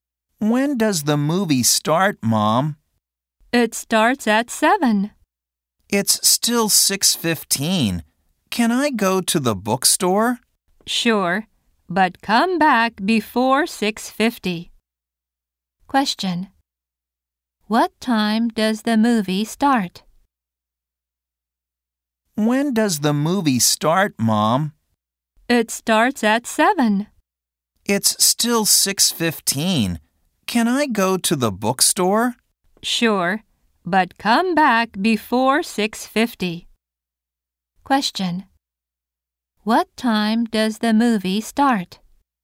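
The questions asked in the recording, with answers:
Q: What time does the movie start?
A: At 7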